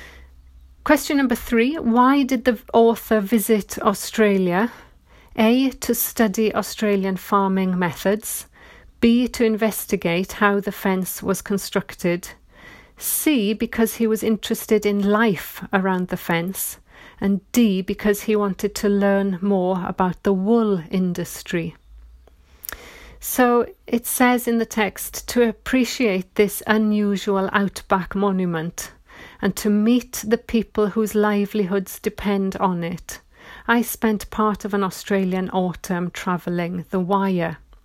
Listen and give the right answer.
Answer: And so the answer is C, because he was interested in life around the fence.